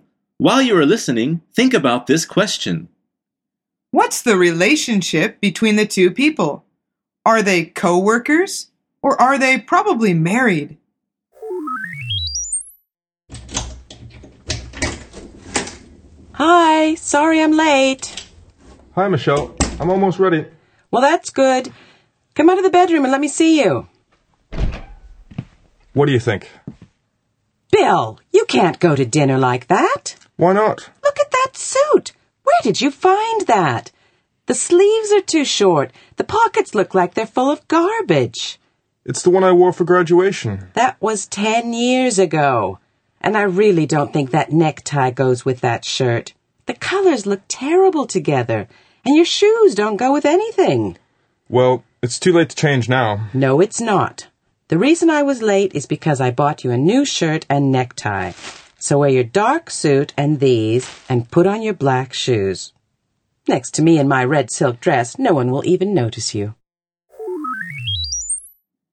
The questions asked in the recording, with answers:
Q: What's the relationship between the two people?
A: The answer is, they are probably married.